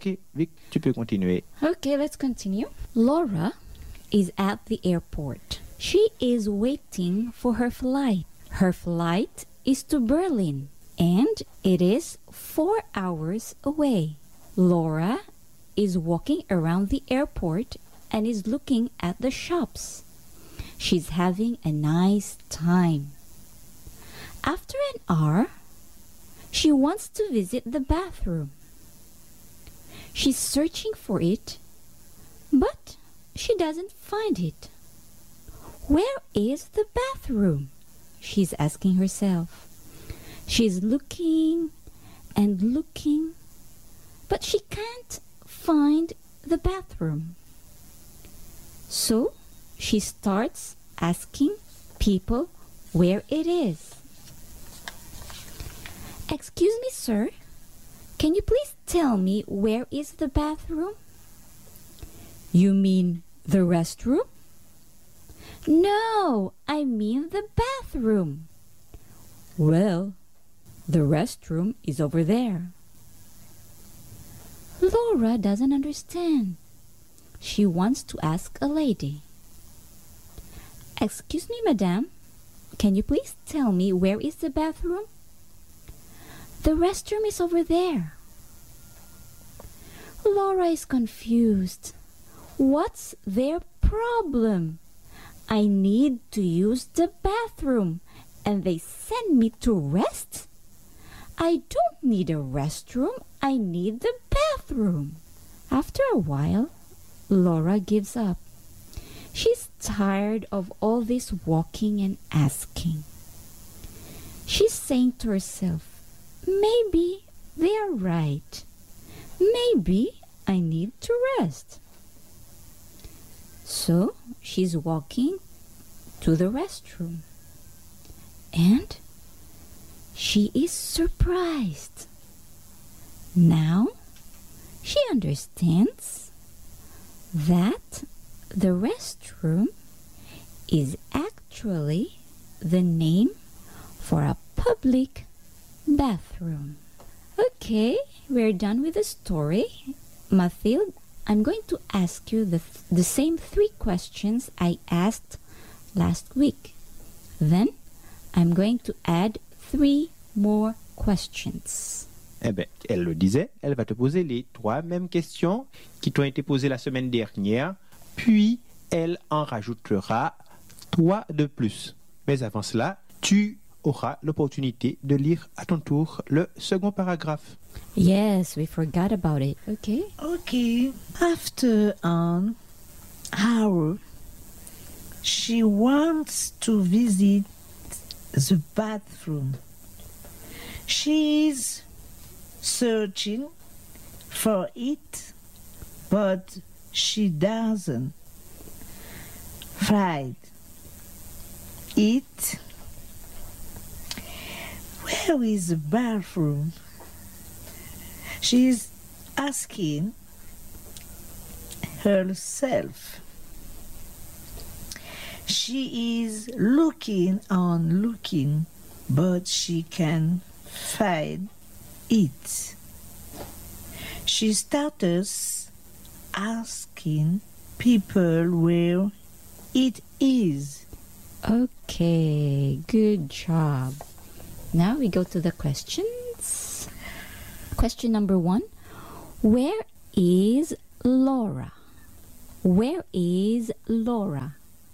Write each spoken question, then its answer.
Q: Where is Laura?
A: Laura is at the airport.